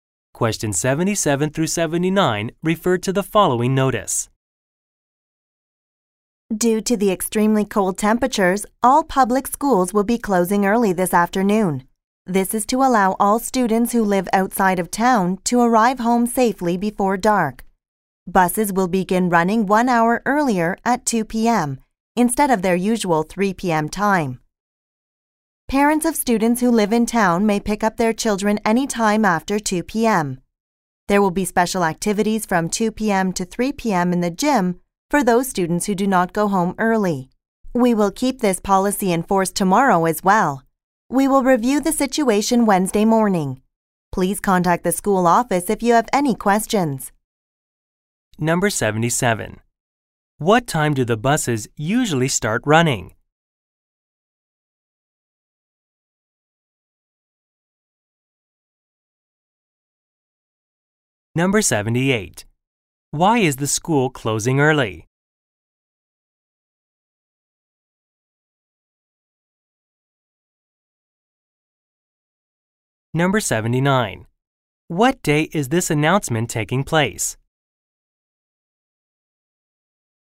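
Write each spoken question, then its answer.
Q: What time do the buses usually start running?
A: 3 p.m.

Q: Why is the school closing early?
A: Because of extremely cold temperatures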